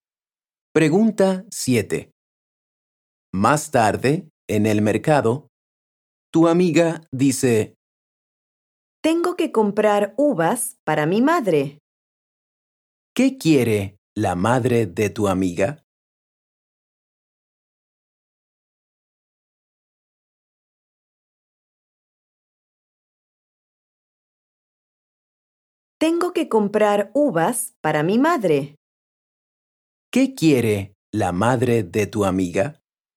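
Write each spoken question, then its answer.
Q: ¿Qué quiere la madre de tu amiga?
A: uvas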